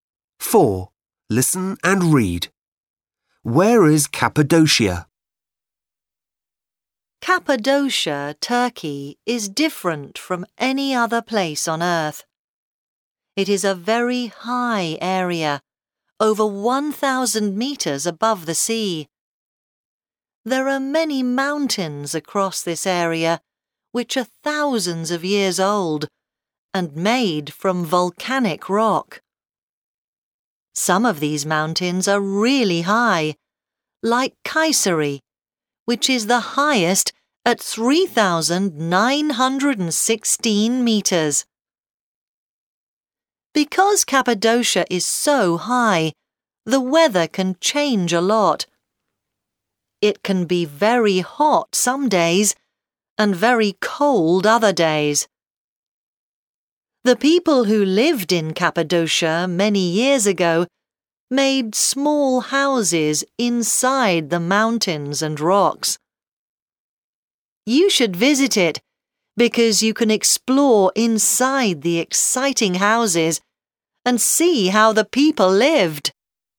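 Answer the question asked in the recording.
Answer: In Turkey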